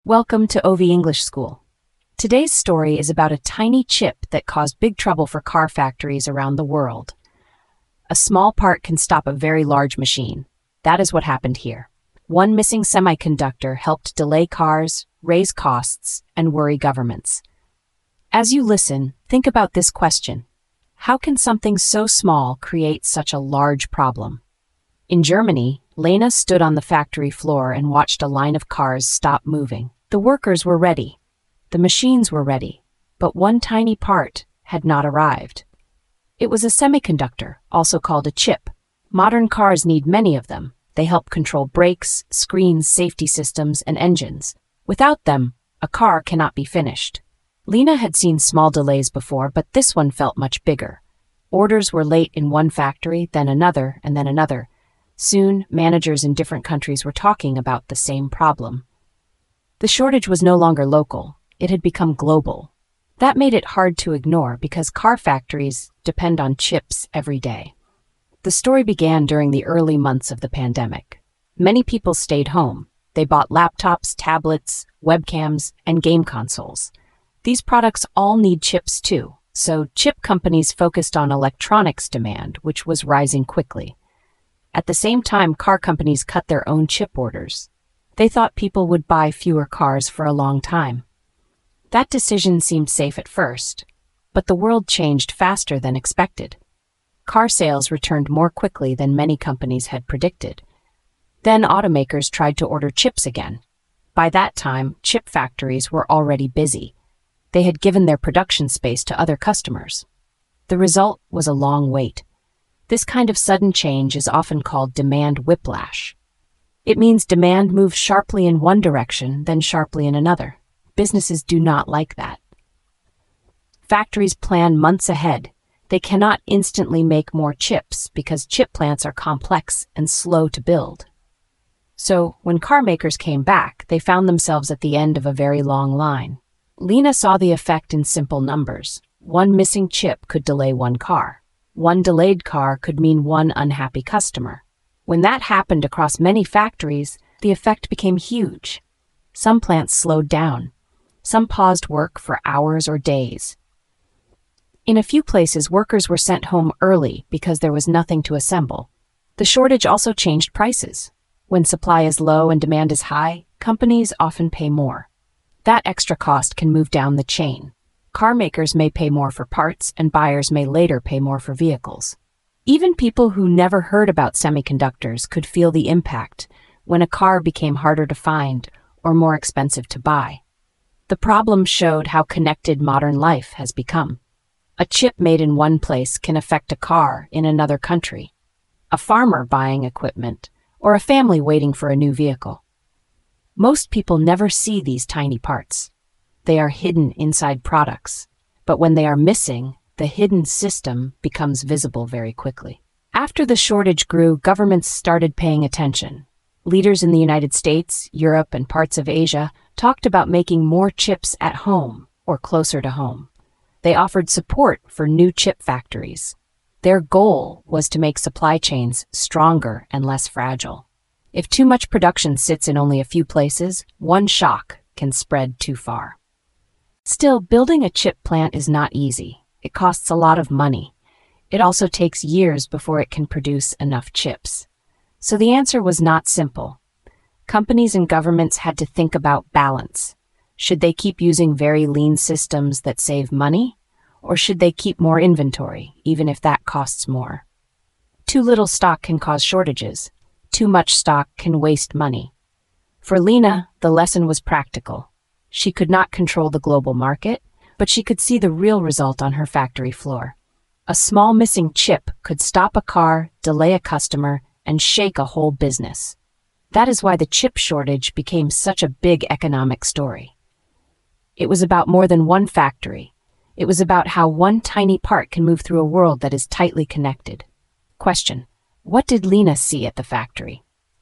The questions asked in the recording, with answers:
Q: what did Lena see at the factory?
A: she saw workers and machines waiting because one tiny chip had not arrived.